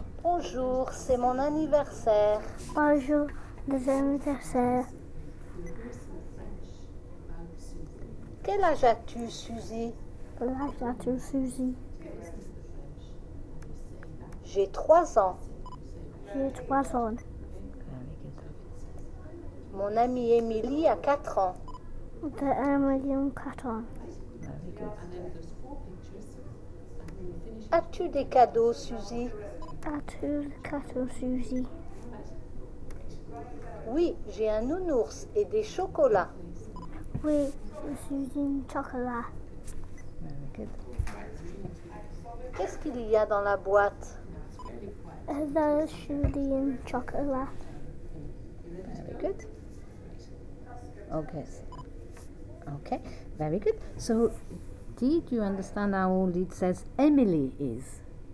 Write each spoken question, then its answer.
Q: So, did you understand how old it says Emily is?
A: Quatre ans.